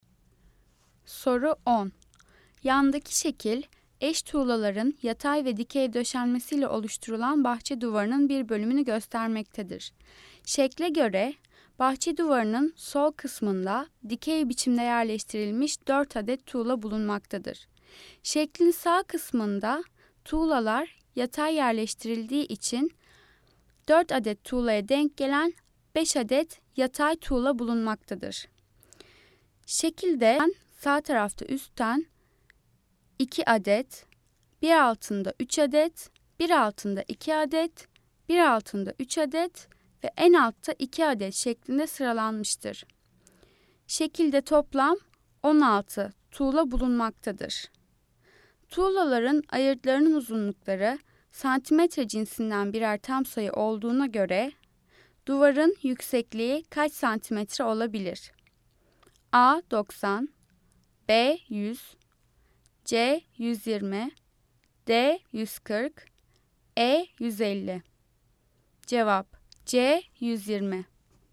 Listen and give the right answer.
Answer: Cevap C 120.